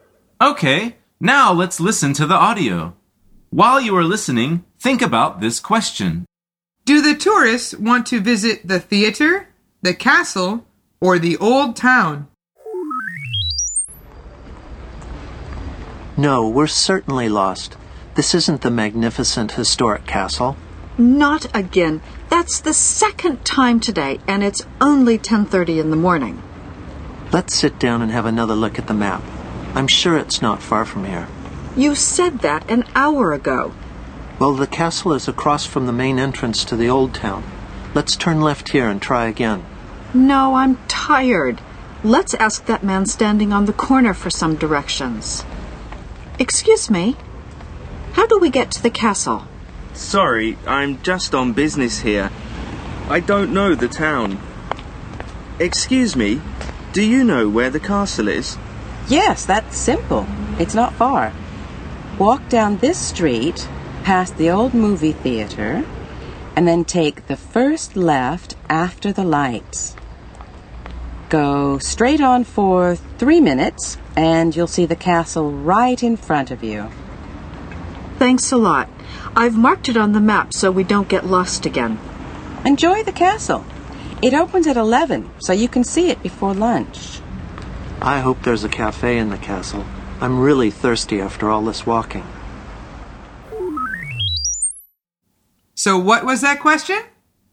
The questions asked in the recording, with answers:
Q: Do the tourists want to visit the theater, the castle, or the old town?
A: The answer is the castle.